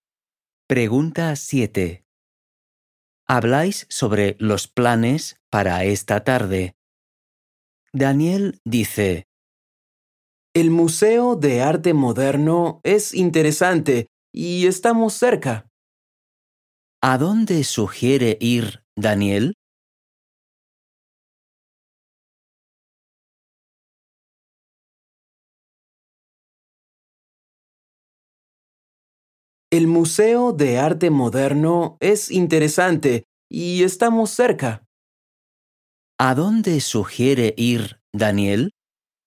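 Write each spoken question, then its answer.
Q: ¿A dónde sugiere ir, Daniel?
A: Al Museo de Arte Moderno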